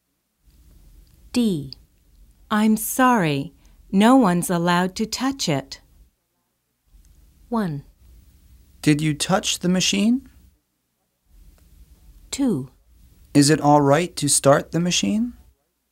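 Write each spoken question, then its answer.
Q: I'm sorry, no one's allowed to touch it.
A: 2: Is it all right to start the machine?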